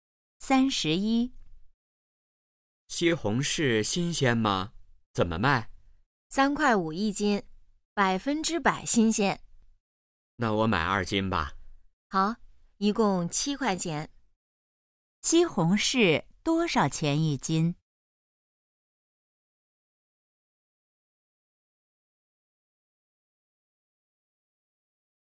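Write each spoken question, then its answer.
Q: 西红柿多少钱一斤?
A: 三块五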